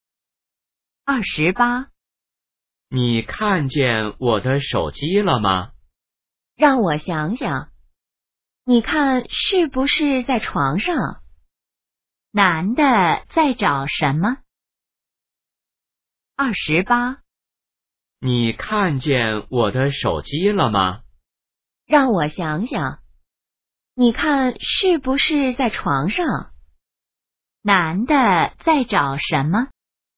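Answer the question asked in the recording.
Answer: 手机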